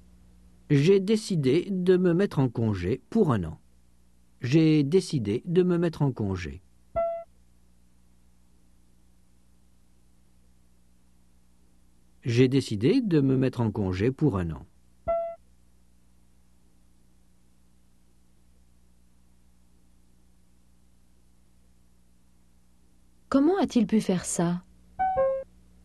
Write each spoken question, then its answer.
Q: Comment a-t-il pu faire ça?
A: Il s'est mis en congé pour 1 an.